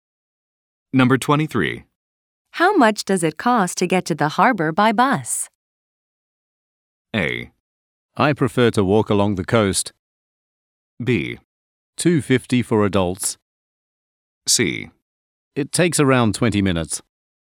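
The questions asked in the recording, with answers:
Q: How much does it cost to get to the harbor by bus?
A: B: $2.50 for adults.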